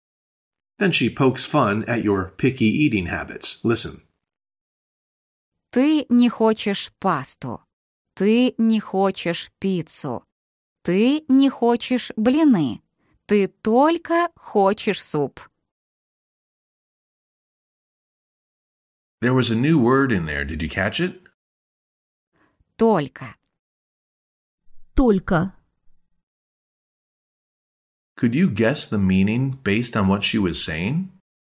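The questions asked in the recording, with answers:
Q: Could you guess the meaning based on what she was saying?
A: Только means "only"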